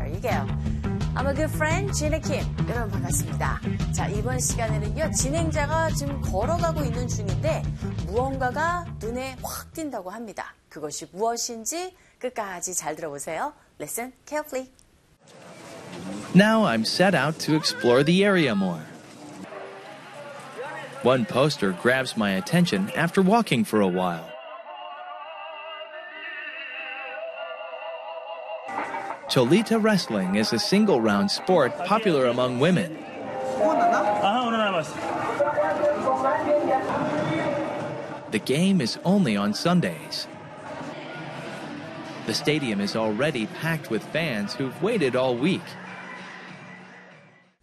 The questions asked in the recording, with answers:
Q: 진행자가 지금 걸어가고 있는 중인데 무언가가 눈에 확 띈다고 합니다. 그것이 무엇인지 끝까지 잘 들어보세요.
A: Poster. 포스터가 눈에 확 사로잡힌 거죠.